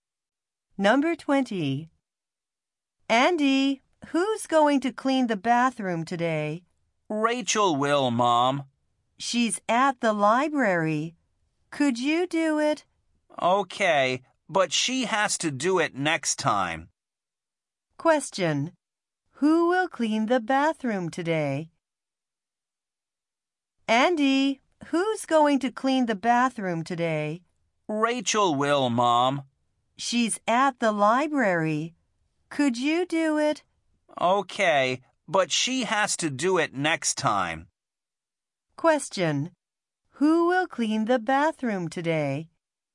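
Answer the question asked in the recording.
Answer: Andy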